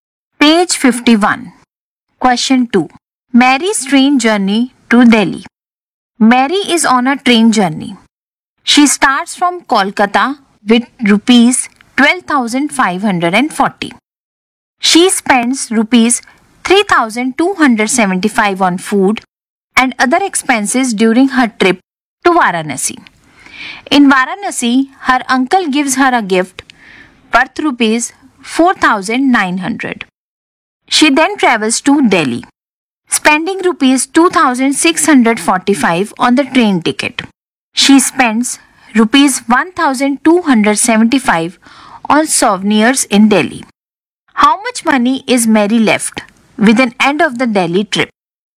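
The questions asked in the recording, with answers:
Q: How much money is Mary left with an end of the Delhi trip?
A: Rupees 10,245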